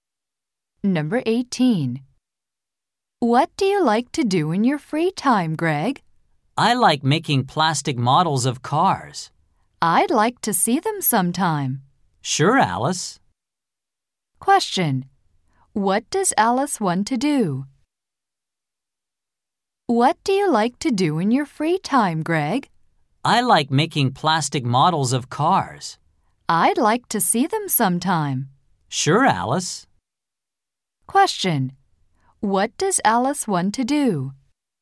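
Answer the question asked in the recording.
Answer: See Greg's plastic car models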